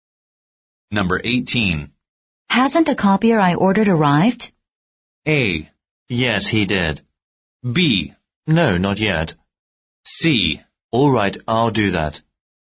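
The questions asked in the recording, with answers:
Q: Hasn't the copier I ordered arrived?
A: B: No, not yet.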